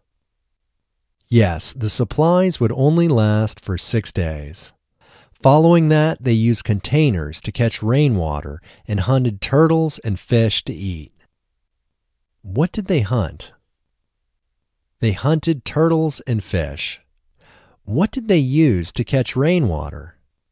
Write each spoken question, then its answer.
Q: What did they use to catch rainwater?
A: They used containers to catch rainwater.